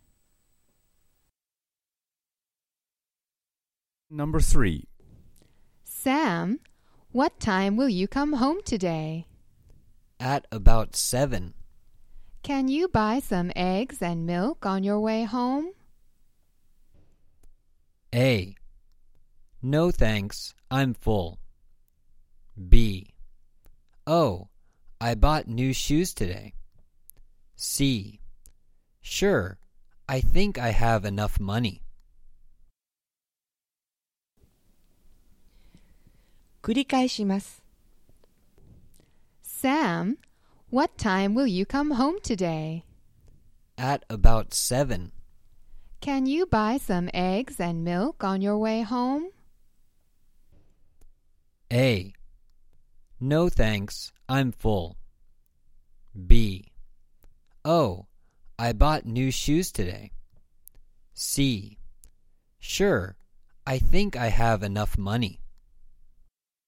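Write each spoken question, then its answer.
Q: Can you buy some eggs and milk on your way home?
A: C: Sure, I think I have enough money.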